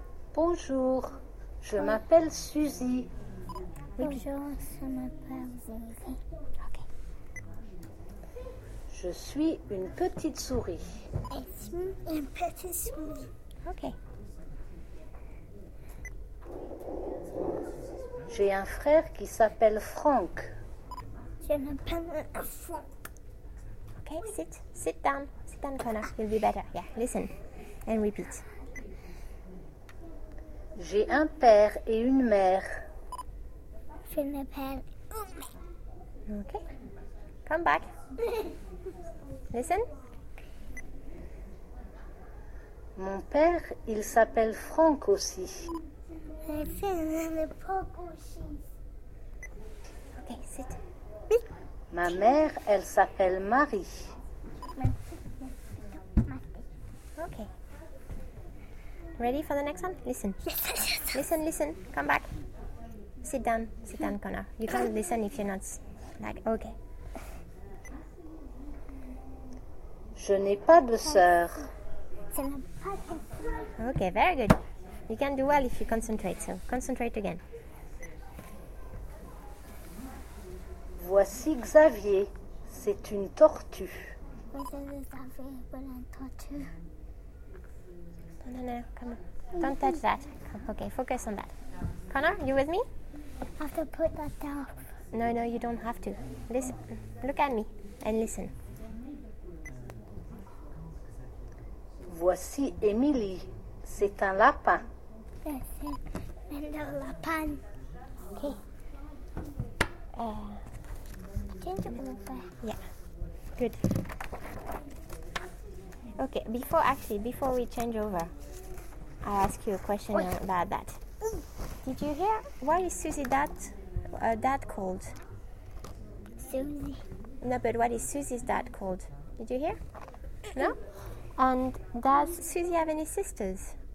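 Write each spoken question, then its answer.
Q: what is Susie's dad called?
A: Franck

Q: And does Susie have any sisters?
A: No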